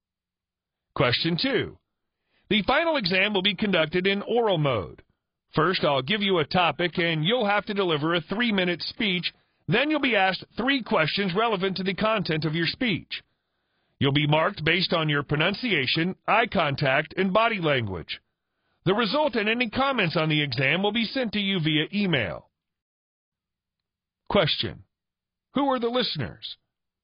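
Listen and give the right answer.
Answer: Students who will take the final oral exam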